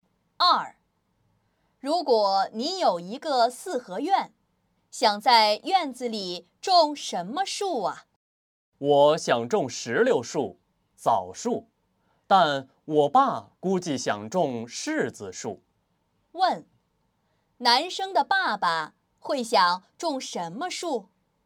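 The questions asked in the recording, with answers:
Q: 男生的爸爸会想种什么树?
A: 柿子树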